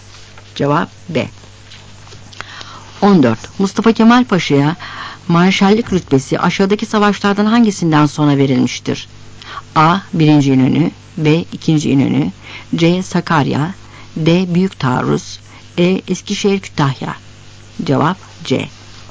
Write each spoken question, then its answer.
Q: Mustafa Kemal Paşa'ya marşallık rütbesi aşağıdaki savaşlardan hangisinden sonra verilmiştir?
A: Cevap C.